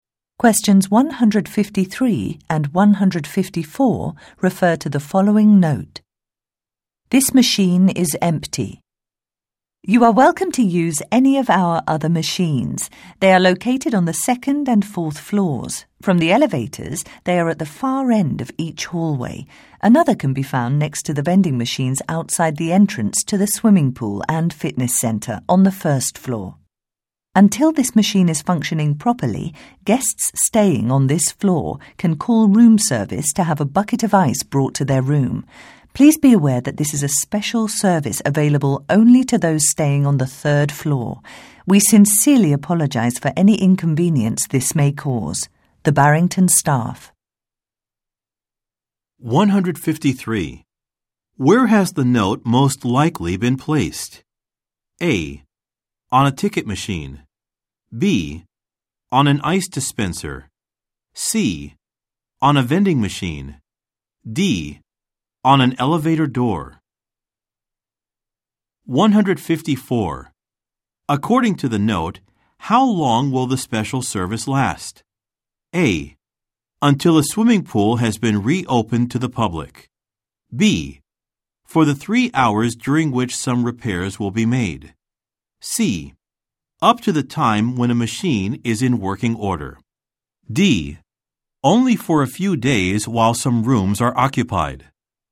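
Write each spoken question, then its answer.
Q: Where has the note most likely been placed?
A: B: On an ice dispenser.

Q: According to the note, how long will the special service last?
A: C: up to the time when a machine is in working order.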